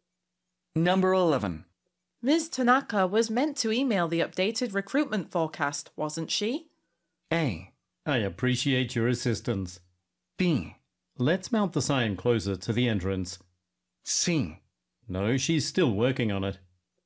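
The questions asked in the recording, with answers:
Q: Ms. Tanaka was meant to email the updated recruitment forecast, wasn't she?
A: C: No, she's still working on it.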